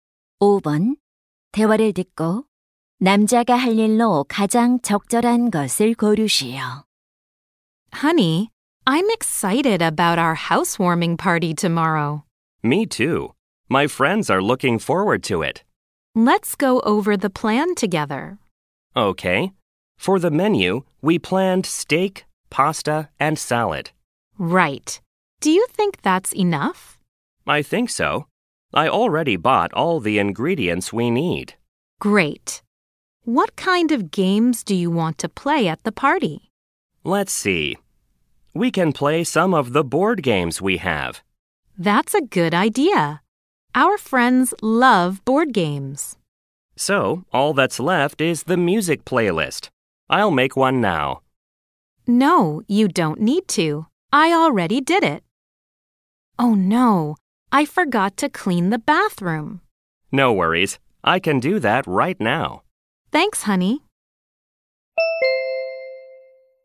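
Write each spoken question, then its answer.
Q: 대화를 듣고 남자가 할 일로 가장 적절한 것을 고르시오.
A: 욕실 청소하기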